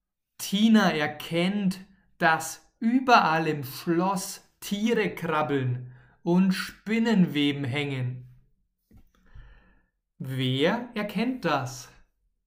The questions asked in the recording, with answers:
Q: Wer erkennt das?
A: Tina, Tina erkennt das.